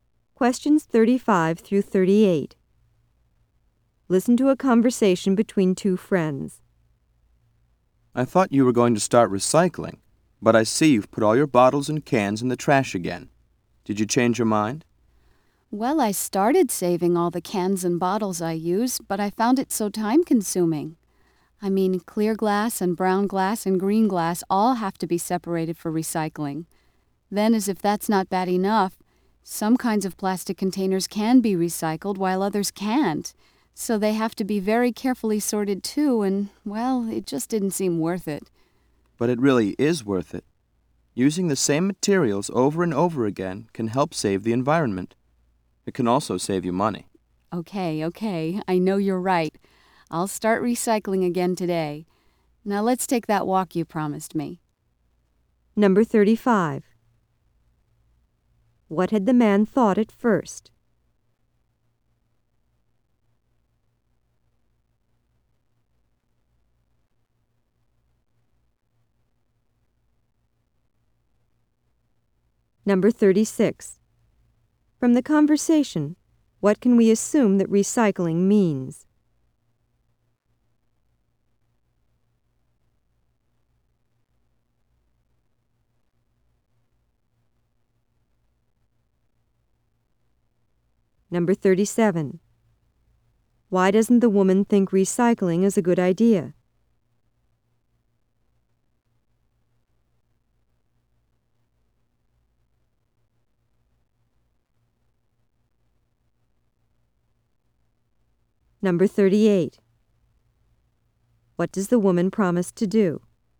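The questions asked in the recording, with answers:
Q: What had the man thought at first?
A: That the woman was going to start recycling

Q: Why doesn't the woman think recycling is a good idea?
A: It takes too much time to sort everything

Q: What does the woman promise to do?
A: Start recycling again today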